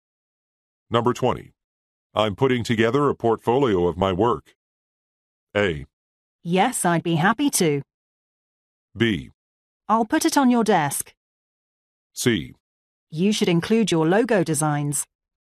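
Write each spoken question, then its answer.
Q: I'm putting together a portfolio of my work.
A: C: You should include your logo designs.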